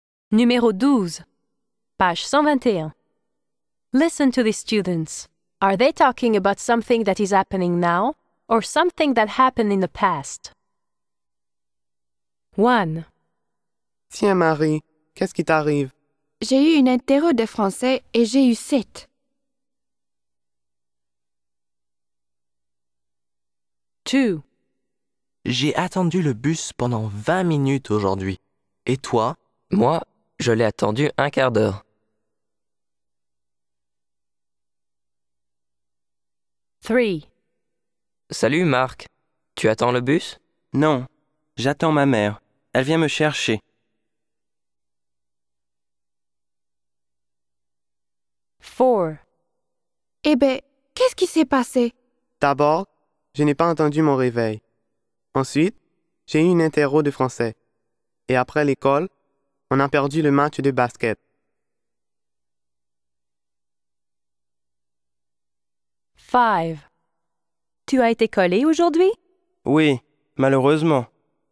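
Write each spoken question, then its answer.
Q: Are they talking about something that is happening now or something that happened in the past?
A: in the past

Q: Are they talking about something that is happening now or something that happened in the past?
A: in the past

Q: Are they talking about something that is happening now or something that happened in the past?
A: happening now

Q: Are they talking about something that is happening now or something that happened in the past?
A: in the past

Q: Are they talking about something that is happening now or something that happened in the past?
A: in the past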